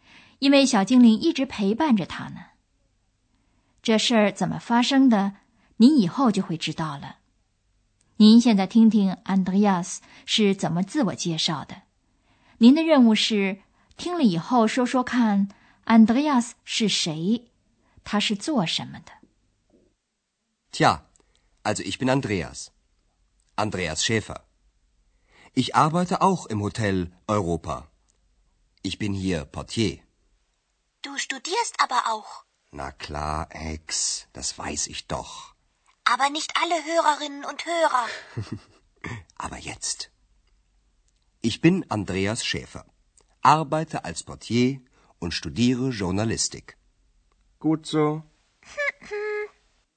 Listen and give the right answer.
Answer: 您听到了 ,Andreas 也在欧洲饭店里工作,他在那儿当门房。